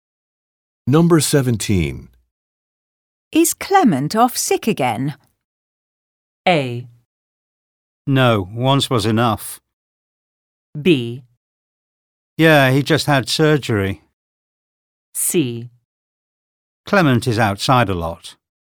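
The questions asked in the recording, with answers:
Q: Is Clement off sick again?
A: B: Yeah, he just had surgery.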